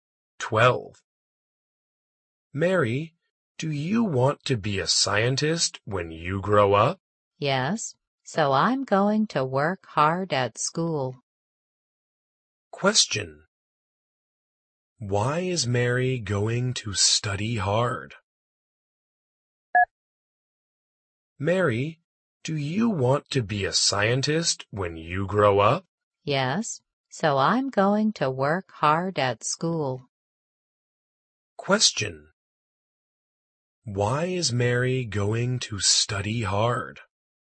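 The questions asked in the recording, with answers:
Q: Why is Mary going to study hard?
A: Because she wants to be a scientist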